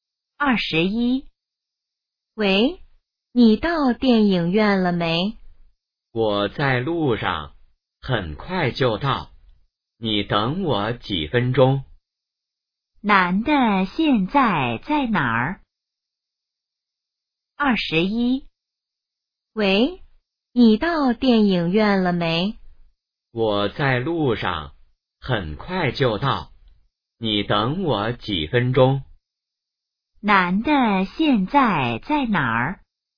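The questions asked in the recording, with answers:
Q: 男的现在在哪儿?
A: 在路上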